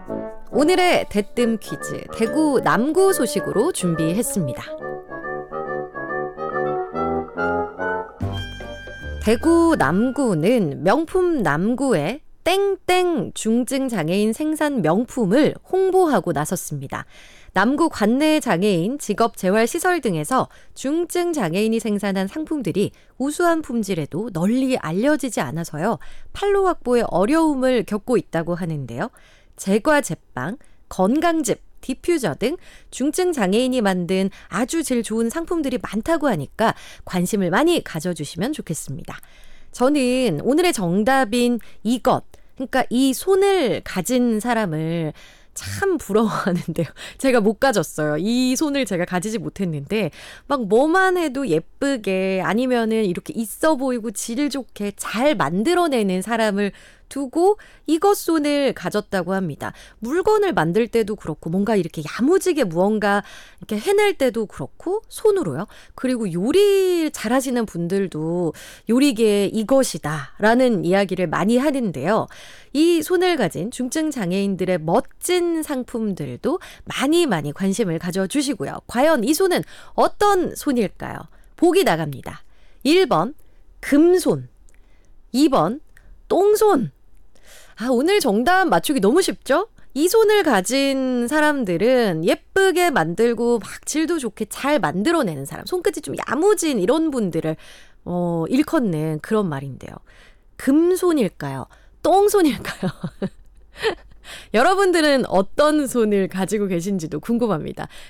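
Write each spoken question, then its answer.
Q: 과연 이 손은 어떤 손일까요?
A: 1번: 금손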